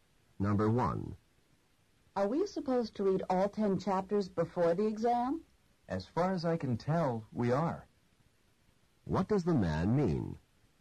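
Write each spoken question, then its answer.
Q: What does the man mean?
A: He thinks they have to read all 10 chapters, but isn't sure.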